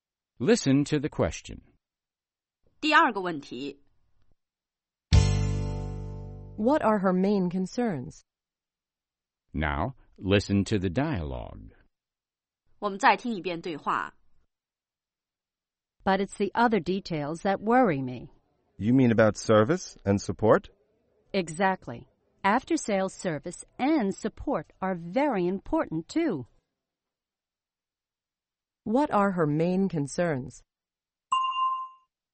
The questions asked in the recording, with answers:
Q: What are her main concerns?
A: Her main concerns are after-sales service and support.